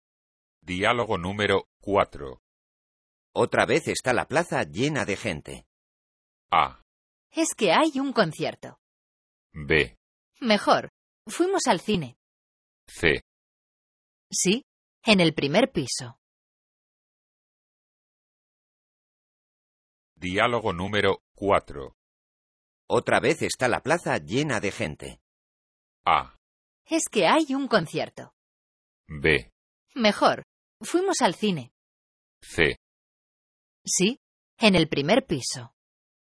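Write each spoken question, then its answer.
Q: Otra vez está la plaza llena de gente.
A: A: Es que hay un concierto.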